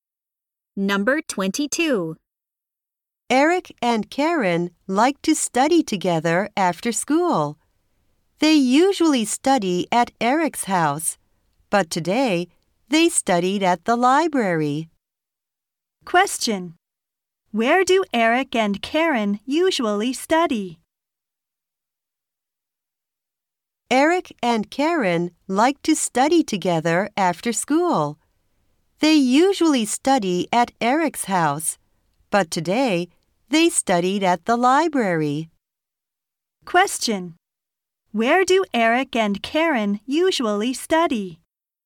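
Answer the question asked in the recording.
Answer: At Eric's house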